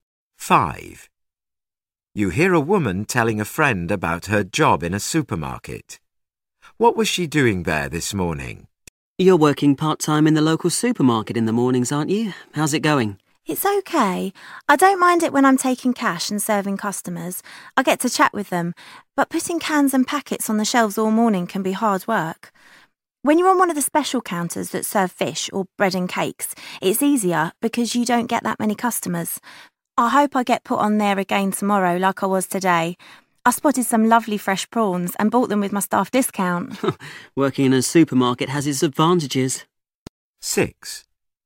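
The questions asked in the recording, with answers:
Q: What was she doing there this morning?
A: Working on a special counter (fish or bread and cakes)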